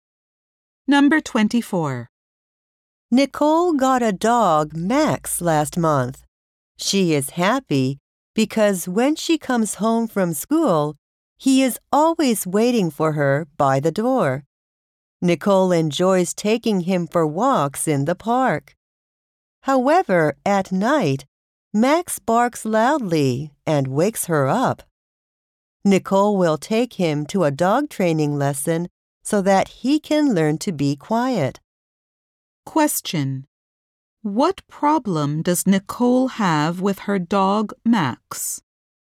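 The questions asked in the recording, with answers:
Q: What problem does Nicole have with her dog, Max?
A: He barks loudly at night and wakes her up.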